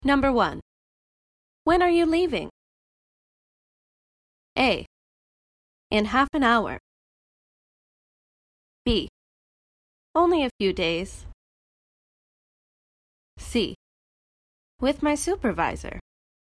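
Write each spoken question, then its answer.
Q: When are you leaving?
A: A: In half an hour.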